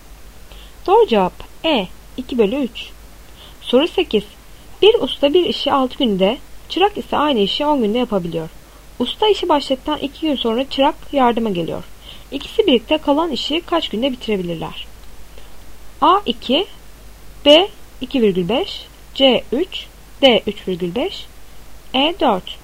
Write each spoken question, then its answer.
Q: İkisi birlikte kalan işi kaç günde bitirebilirler?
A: Doğru cevap B 2,5.